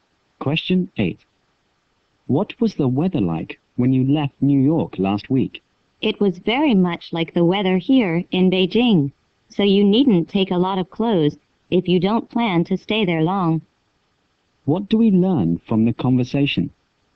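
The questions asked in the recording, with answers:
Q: What do we learn from the conversation?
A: The weather in New York is similar to Beijing's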